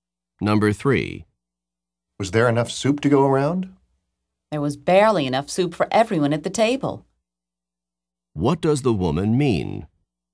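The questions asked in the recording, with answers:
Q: What does the woman mean?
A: There was just enough soup for everyone.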